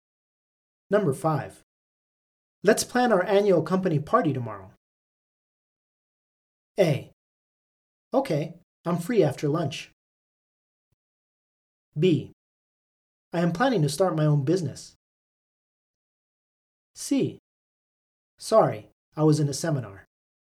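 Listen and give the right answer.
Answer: A: Okay, I'm free after lunch.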